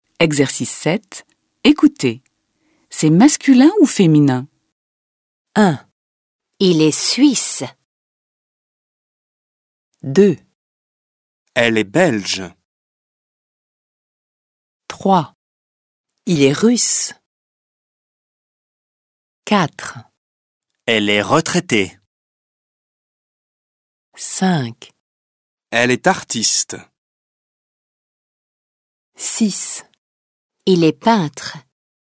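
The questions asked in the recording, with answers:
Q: Il est suisse.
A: masculin

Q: Elle est belge.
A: féminin

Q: Il est russe.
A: masculin

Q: Elle est retraitée.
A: féminin

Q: Elle est artiste.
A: féminin

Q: Il est peintre.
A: masculin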